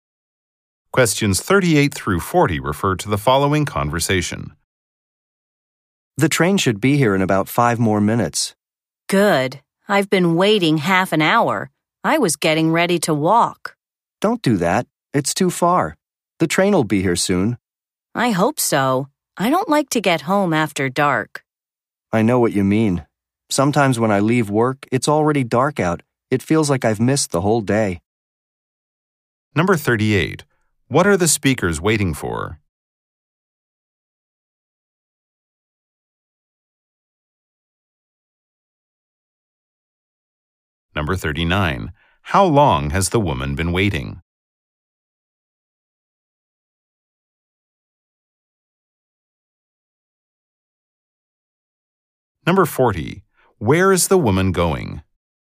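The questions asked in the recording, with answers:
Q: What are the speakers waiting for?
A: A train.

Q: How long has the woman been waiting?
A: Half an hour.

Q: Where is the woman going?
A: Home.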